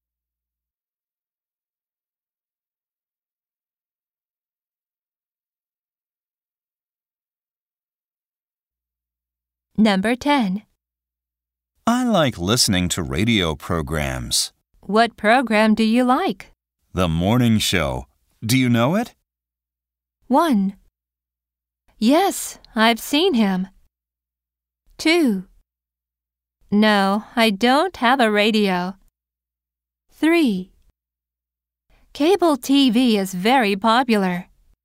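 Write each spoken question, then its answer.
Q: The morning show. Do you know it?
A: 2: No, I don't have a radio.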